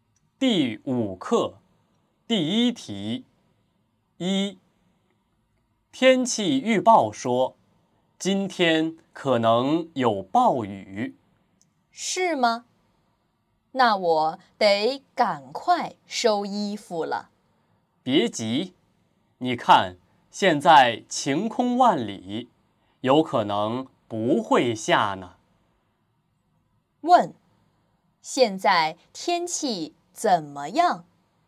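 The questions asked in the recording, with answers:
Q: 问,现在天气怎么样?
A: 晴天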